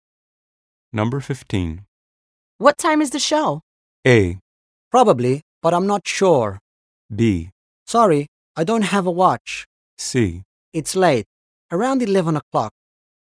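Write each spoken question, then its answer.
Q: What time is the show?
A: C: It's late, around 11 o'clock.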